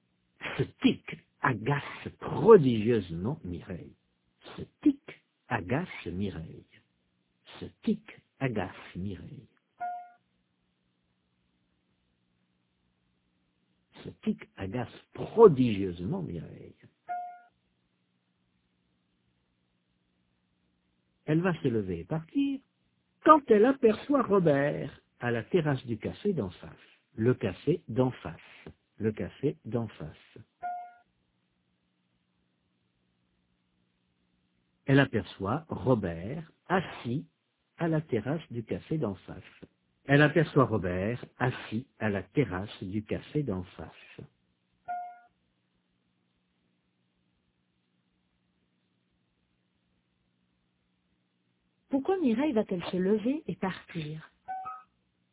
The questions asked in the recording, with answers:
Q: Pourquoi Mireille va-t-elle se lever et partir?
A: Parce que ce tic l'agace.